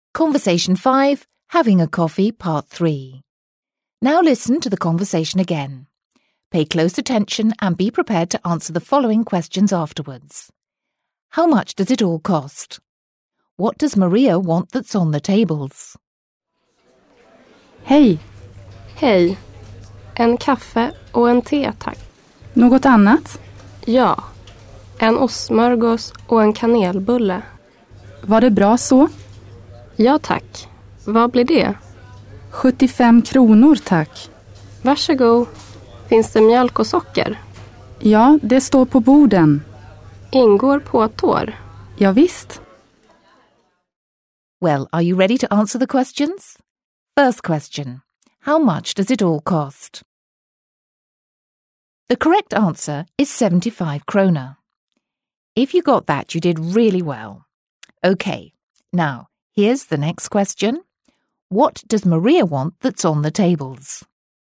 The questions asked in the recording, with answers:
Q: What does Maria want that's on the tables?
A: Yes, it's milk and sugar.